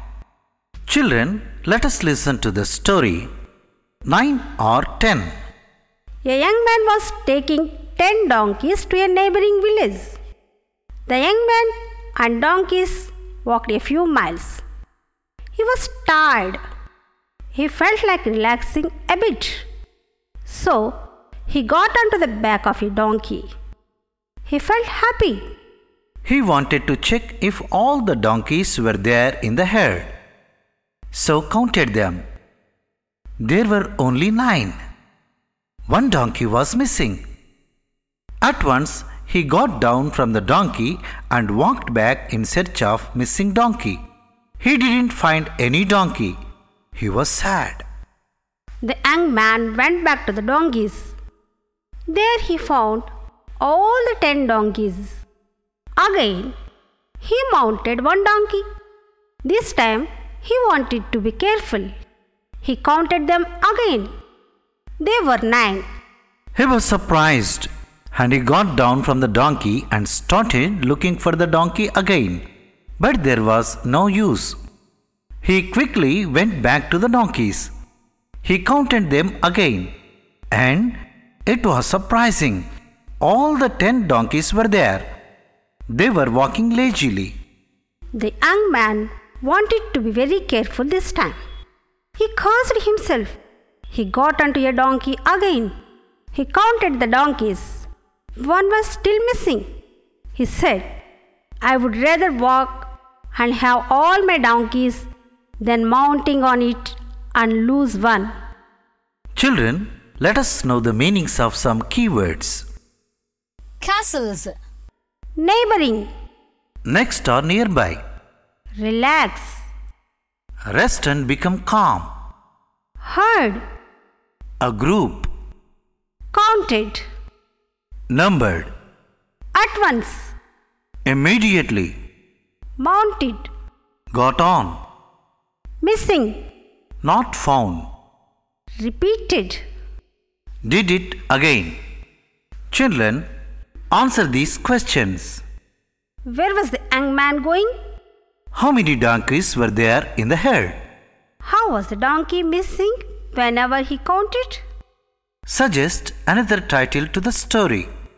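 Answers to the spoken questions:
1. To a neighboring village
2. 10
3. He forgot to count the donkey he was sitting on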